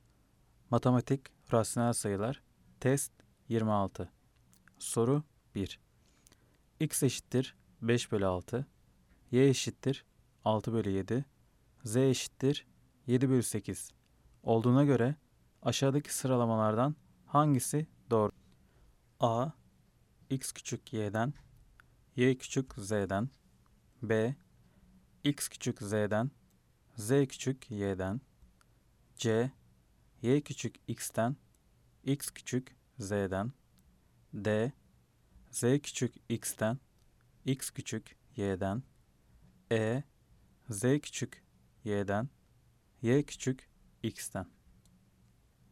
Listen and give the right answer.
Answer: Cevap Adana, X küçük Y'den, Y küçük Z'den.